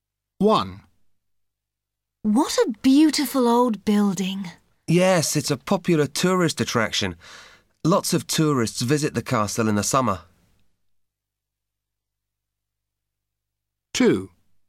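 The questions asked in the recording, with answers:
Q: Where are the people?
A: at a castle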